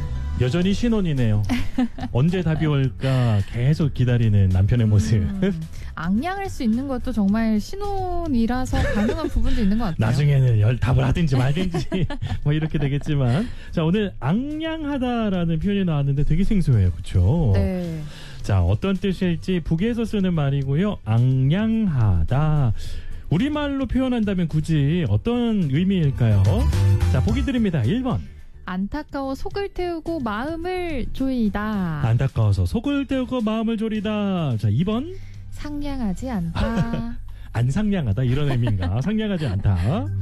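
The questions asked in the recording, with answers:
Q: 자 어떤 뜻일지 북에서 쓰는 말이고요. 악량하다. 우리말로 표현한다면 굳이 어떤 의미일까요?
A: 1: 안타까워 속을 태우고 마음을 조이다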